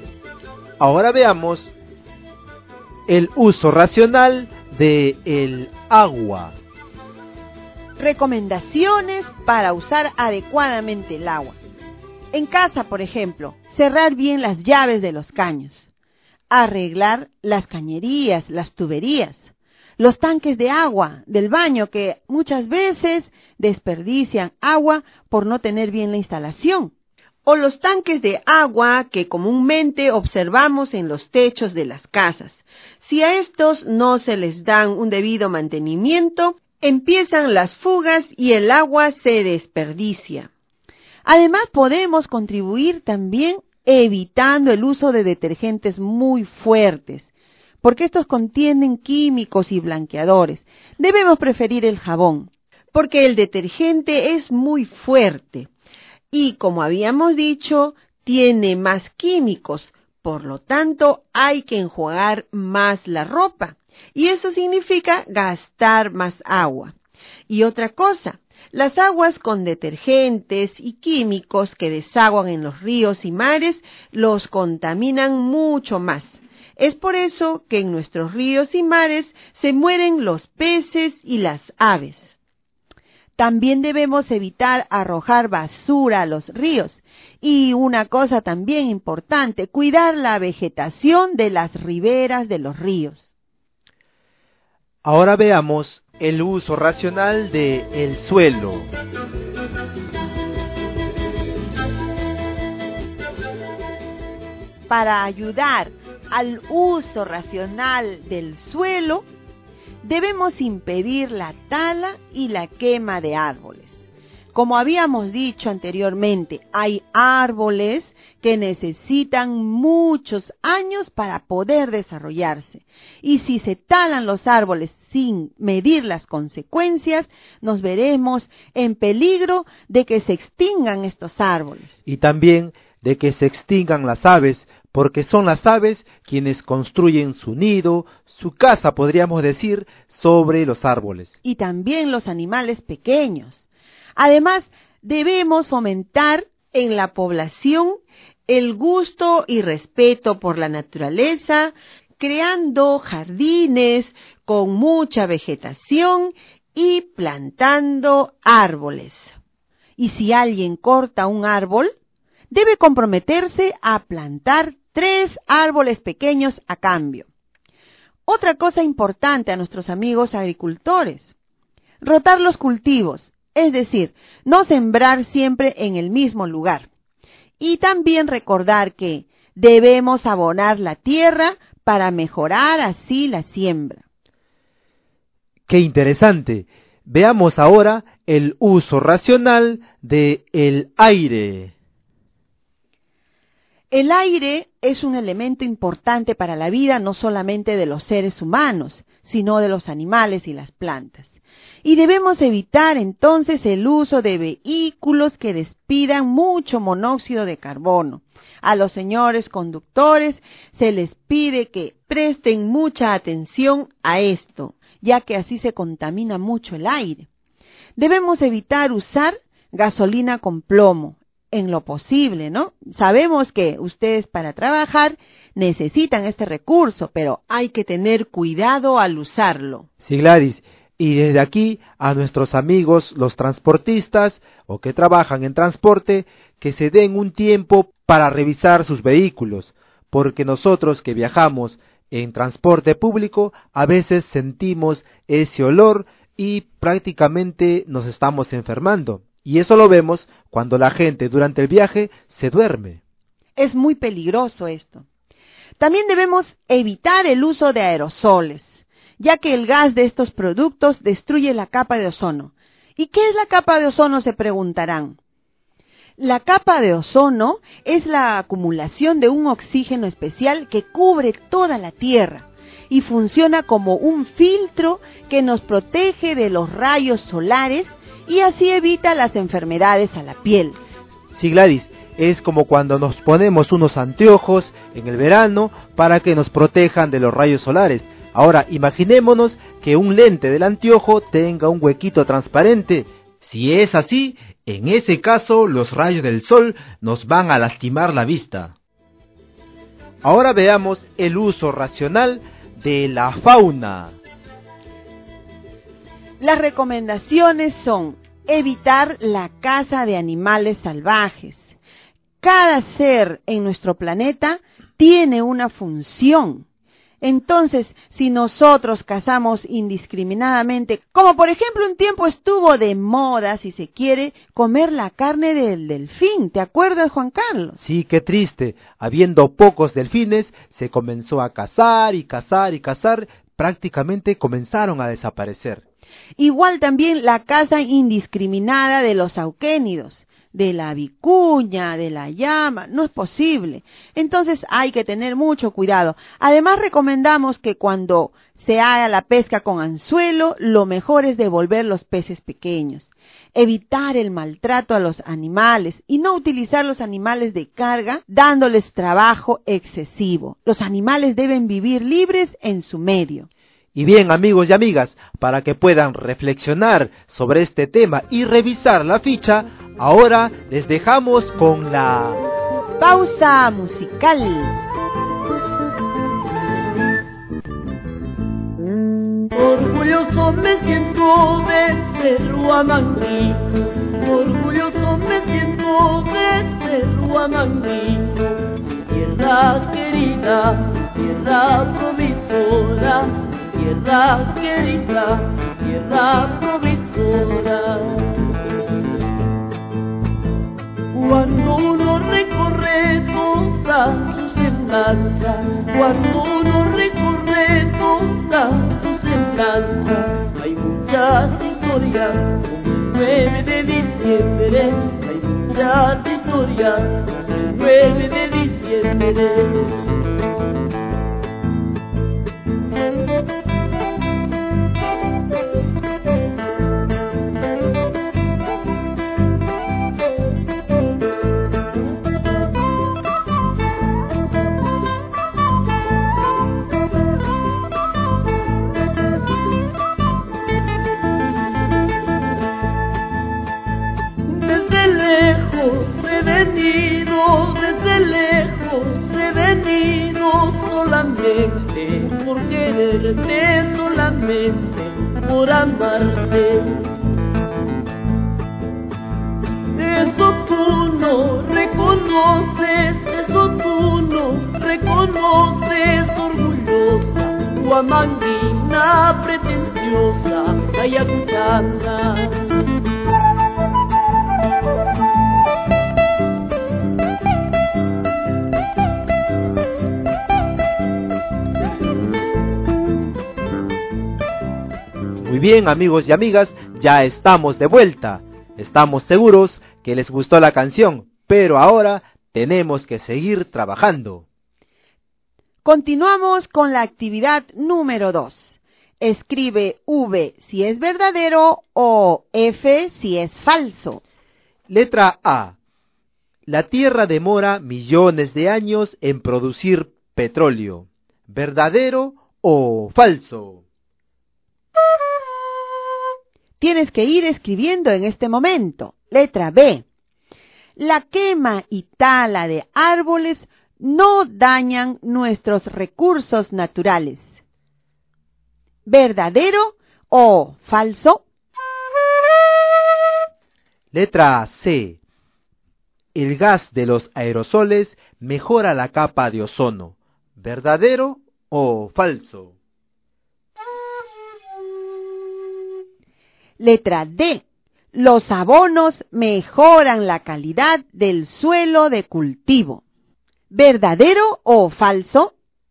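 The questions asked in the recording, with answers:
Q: Letra B. La quema y tala de árboles no dañan nuestros recursos naturales.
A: Falso

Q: Letra C. El gas de los aerosoles mejora la capa de ozono.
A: Falso

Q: Letra D. Los abonos mejoran la calidad del suelo de cultivo.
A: Verdadero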